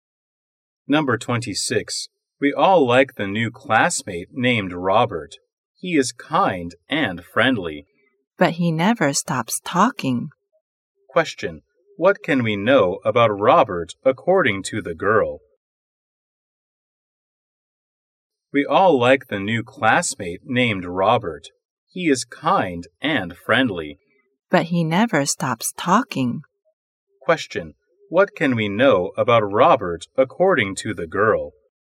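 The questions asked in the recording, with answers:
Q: What can we know about Robert according to the girl?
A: He is kind and friendly but talks too much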